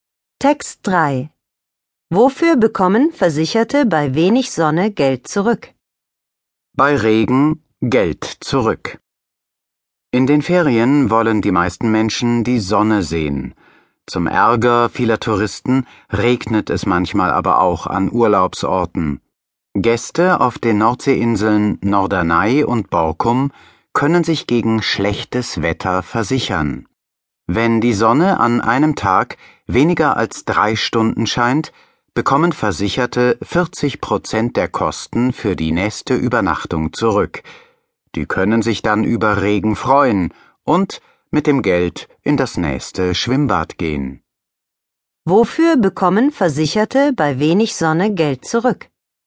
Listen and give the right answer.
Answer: Sie bekommen Geld für die nächste Übernachtung zurück.